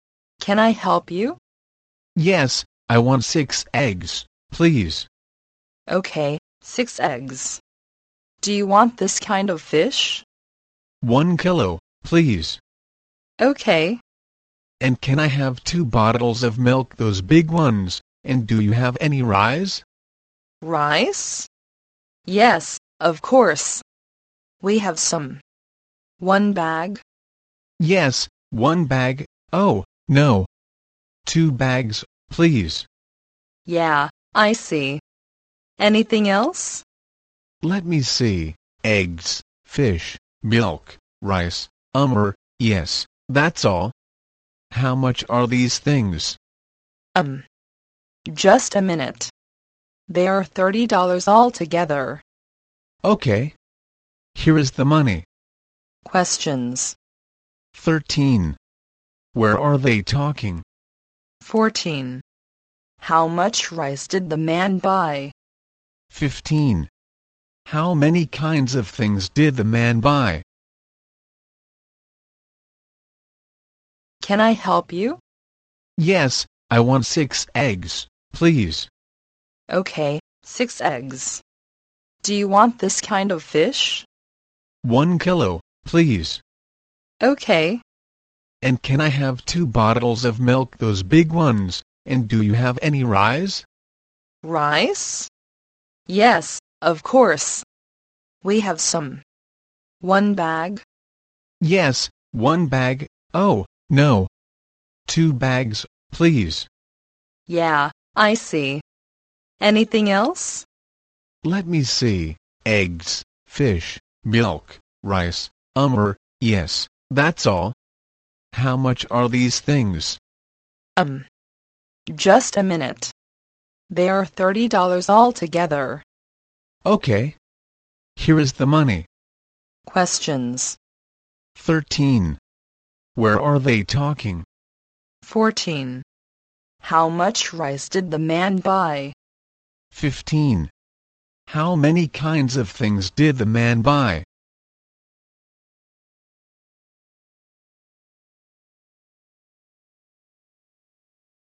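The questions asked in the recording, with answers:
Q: Where are they talking?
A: In a shop

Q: How much rice did the man buy?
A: Two bags

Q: How many kinds of things did the man buy?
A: Four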